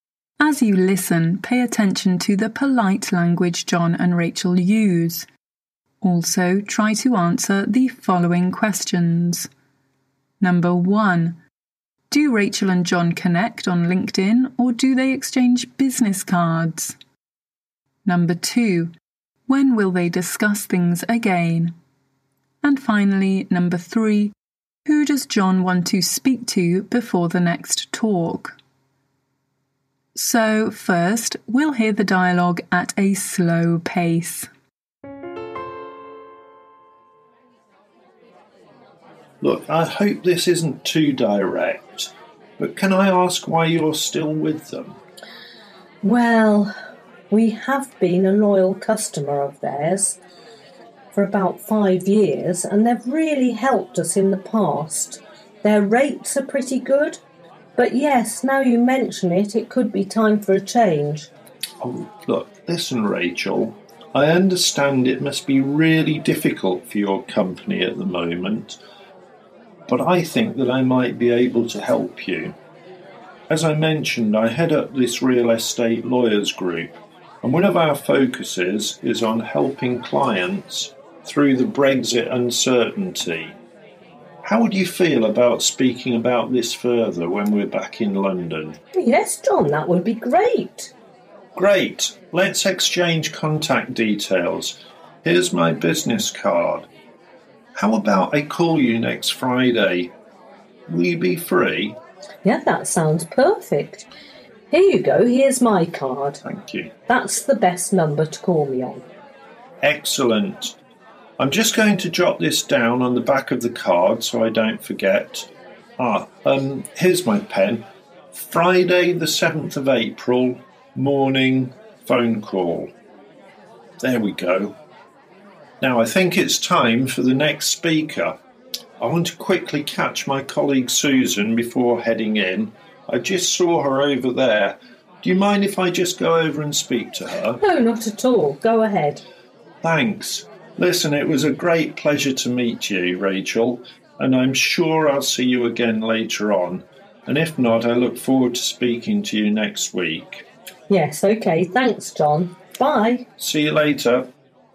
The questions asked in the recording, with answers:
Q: Do Rachel and John connect on LinkedIn or do they exchange business cards?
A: Okay, so they exchange business cards.

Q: When will they discuss things again?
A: So, they will talk to each other on Friday the 7th of April in the morning.

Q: who does John want to speak to before the next talk?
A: So John wants to speak to his colleague Susan.